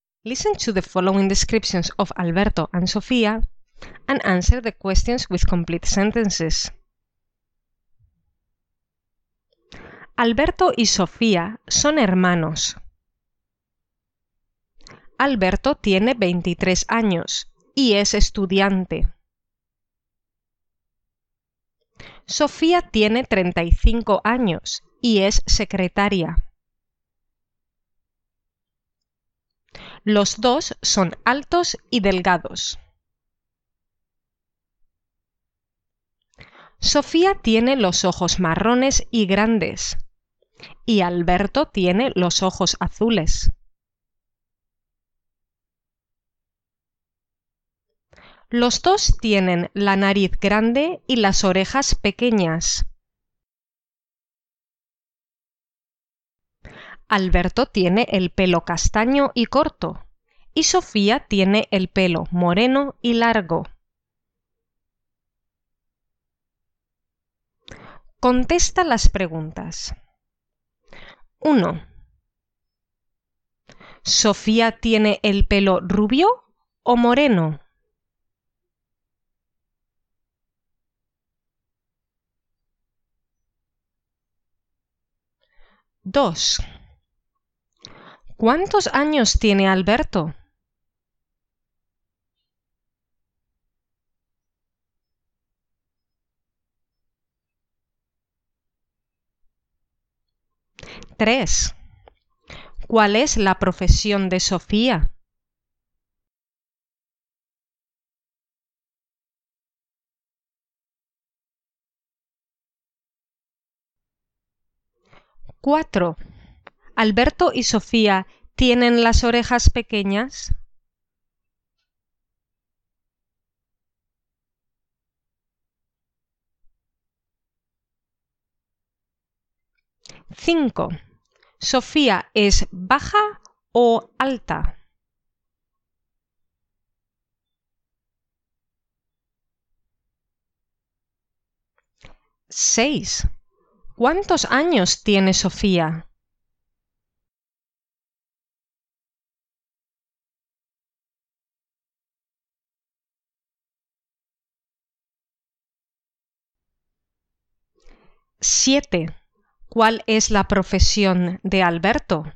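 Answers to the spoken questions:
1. Sofía tiene el pelo moreno.
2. Alberto tiene 23 años.
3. Sofía es secretaria.
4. Sí, tienen las orejas pequeñas.
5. Sofía es alta.
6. Sofía tiene 35 años.
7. Alberto es estudiante.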